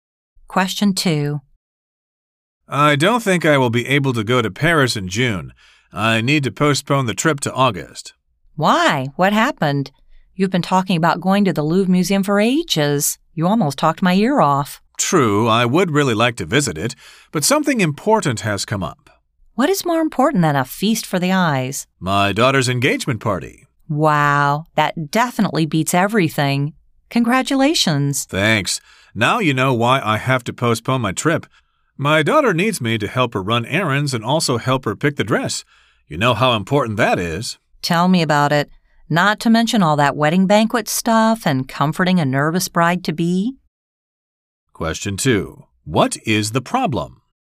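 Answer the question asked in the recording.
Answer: She can't go to Paris in June and must postpone the trip to August because of her daughter's engagement party.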